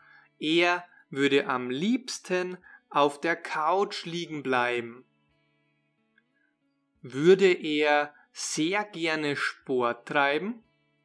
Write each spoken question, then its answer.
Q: Würde er sehr gerne Sport treiben?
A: Nein, das würde er nicht gerne.